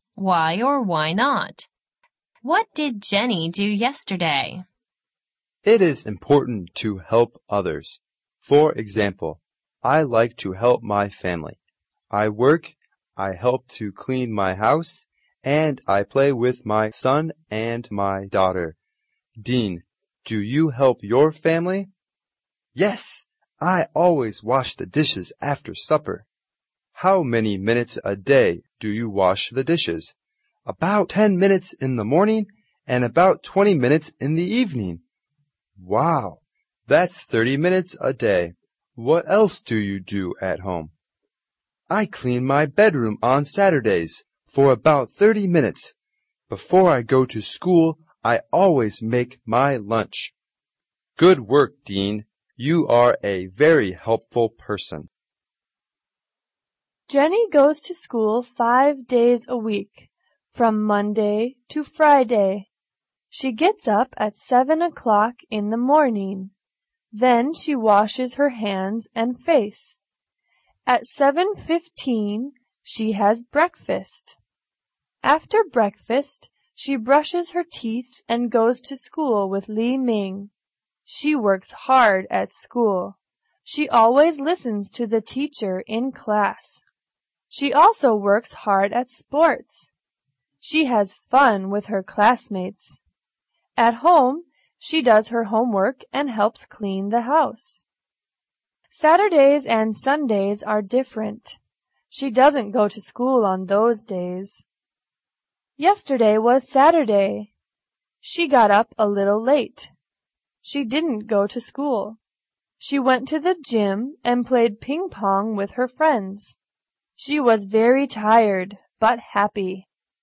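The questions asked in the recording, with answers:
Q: What did Jenny do yesterday?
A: She went to the gym and played ping pong with her friends.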